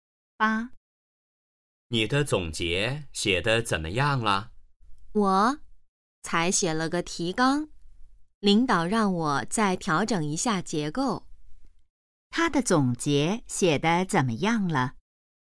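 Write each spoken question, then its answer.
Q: 他的总结写得怎么样了?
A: 只写了提纲,还要调整结构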